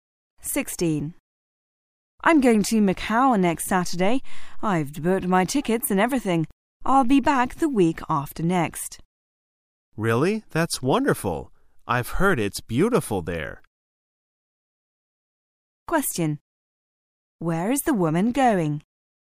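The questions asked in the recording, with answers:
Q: Where is the woman going?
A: Macau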